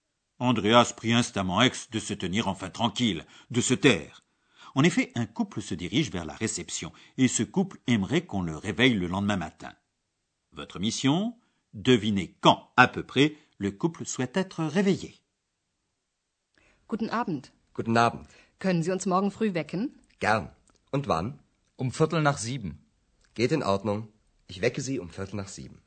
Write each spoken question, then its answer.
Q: Votre mission Devinez quand, à peu près, le couple souhaite être réveillé.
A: Le couple aimerait qu'on le réveille vers 7 heures, pour être plus exact, à 7 heures et quart.